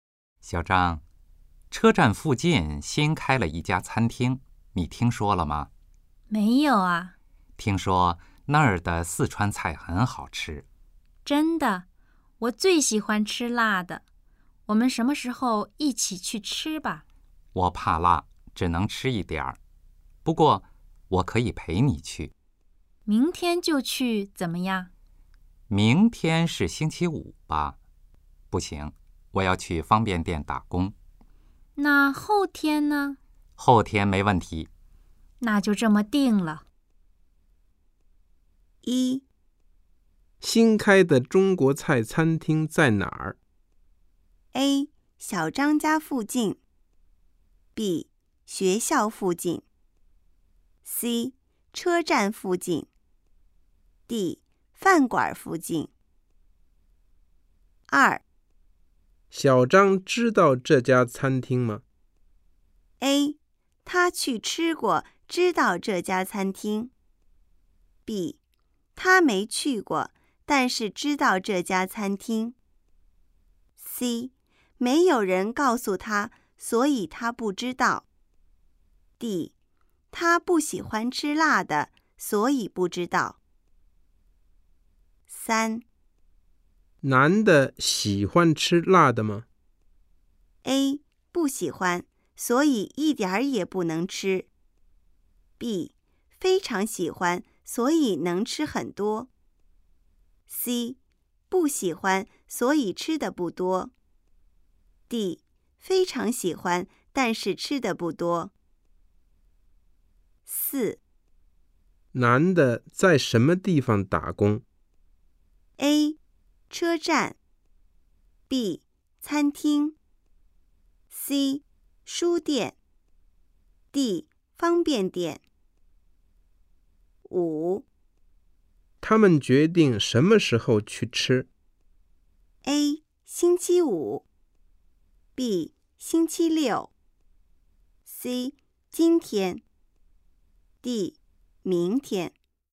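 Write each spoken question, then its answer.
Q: 新开的中国菜餐厅在哪儿?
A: C: 车站附近

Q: 小张知道这家餐厅吗?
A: C: 没有人告诉他,所以他不知道。

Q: 他们决定什么时候去吃?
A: B: 星期六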